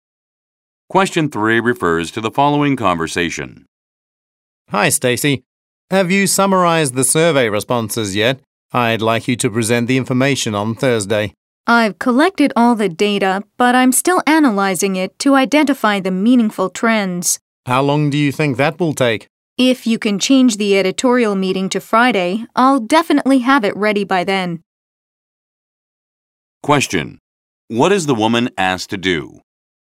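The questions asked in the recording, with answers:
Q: What is the woman asked to do?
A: Present the survey information on Thursday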